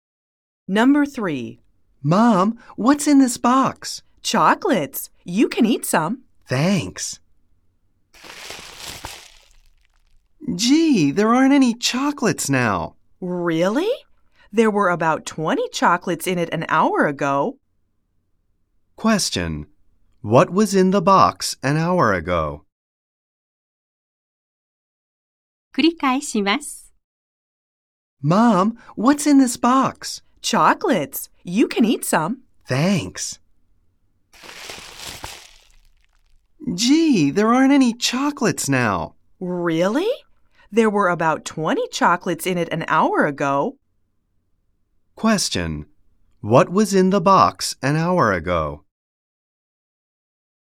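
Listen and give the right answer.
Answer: About 20 chocolates.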